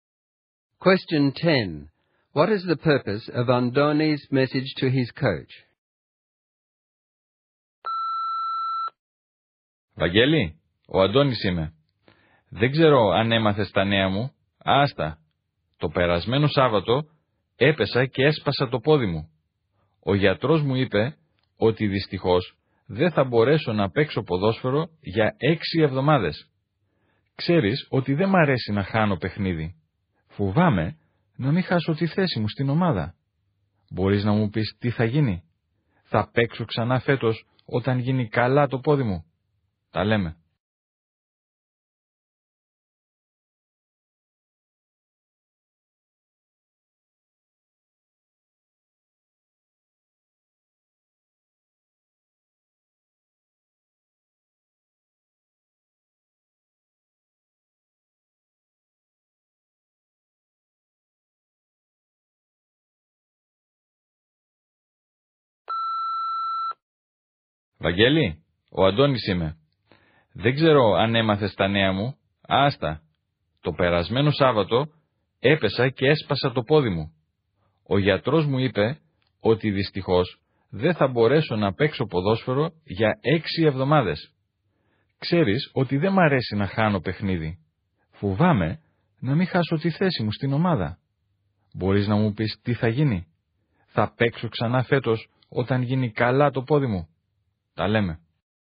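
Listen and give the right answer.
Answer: To tell him he broke his leg and can't play for 6 weeks, and to ask whether he will keep his place and play again this year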